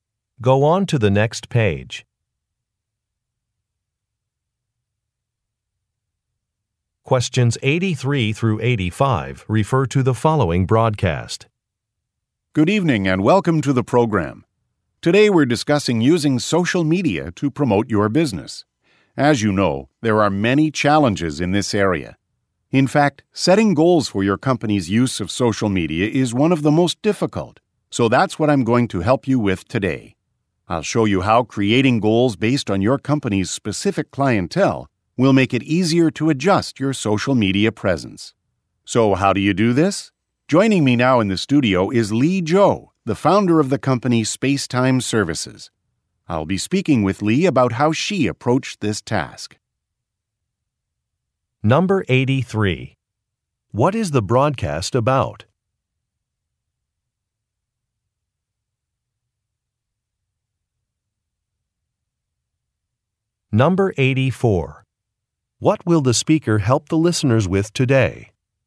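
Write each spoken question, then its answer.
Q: What is the broadcast about?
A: Using social media to promote a business

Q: What will the speaker help the listeners with today?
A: Setting goals for their company's use of social media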